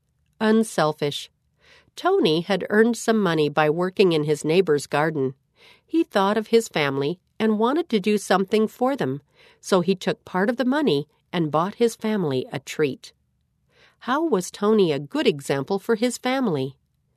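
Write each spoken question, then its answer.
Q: How was Tony a good example for his family?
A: He used part of his money to buy his family a treat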